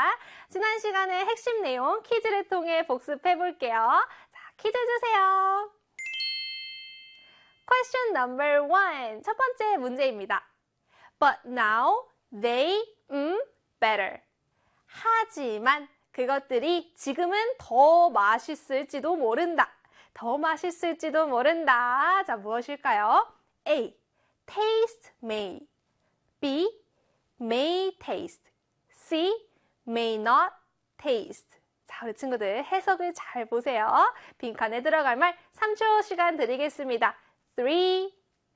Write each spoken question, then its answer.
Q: 첫 번째 문제입니다. But now they better.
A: 네, 바로 B의 may taste 였습니다.